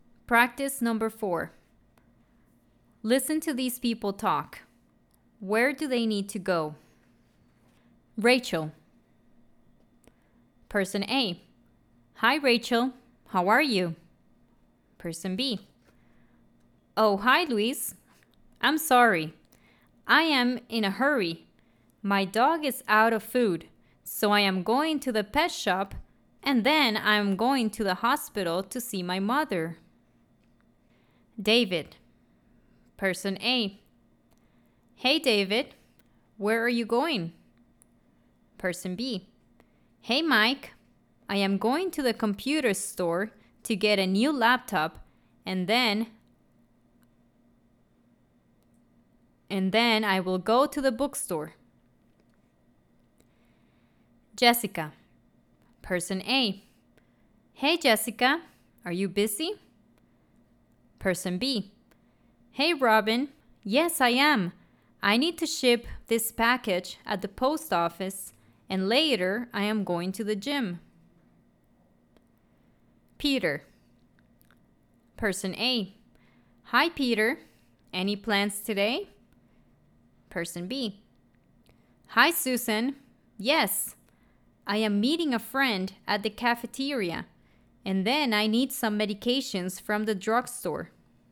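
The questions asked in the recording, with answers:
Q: Where do they need to go?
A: the pet shop and the hospital

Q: Where do they need to go?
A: the computer store and the bookstore

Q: Where do they need to go?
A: the post office and the gym

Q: Where do they need to go?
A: the cafeteria and the drugstore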